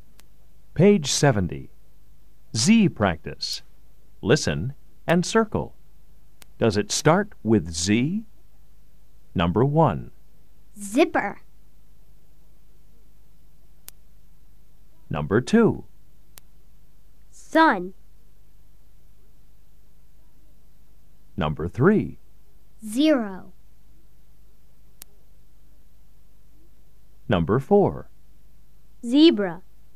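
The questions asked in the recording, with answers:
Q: Does it start with Z?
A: Yes (zipper)

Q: Does it start with Z?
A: No (sun)

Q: Does it start with Z?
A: Yes (zero)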